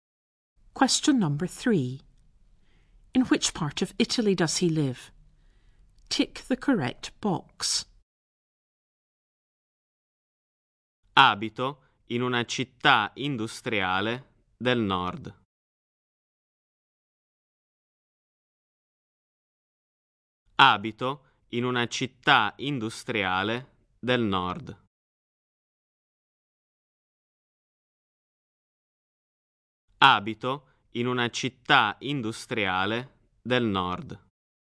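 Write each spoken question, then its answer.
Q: In which part of Italy does he live?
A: The north (an industrial city)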